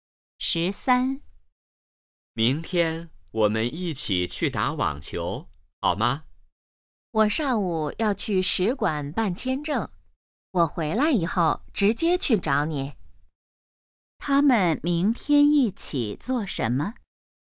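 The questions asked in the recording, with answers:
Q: 他们明天一起做什么?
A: 打网球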